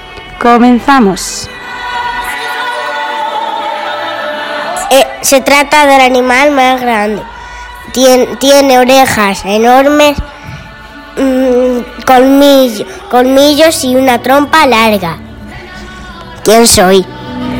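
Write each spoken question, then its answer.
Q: ¿Quién soy?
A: el elefante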